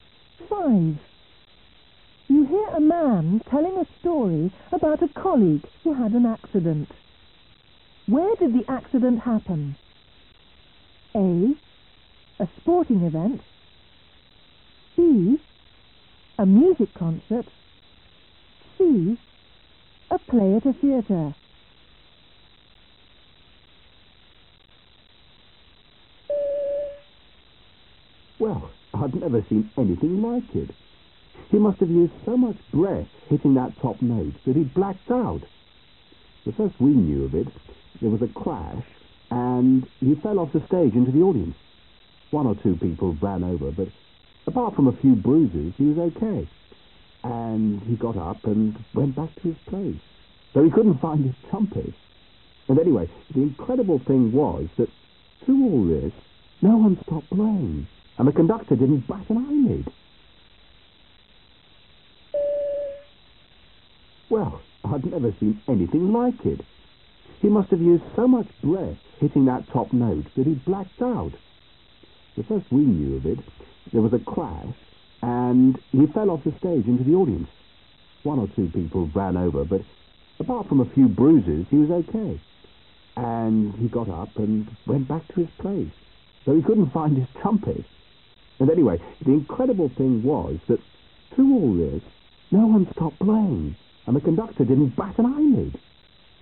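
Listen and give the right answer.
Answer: B: A music concert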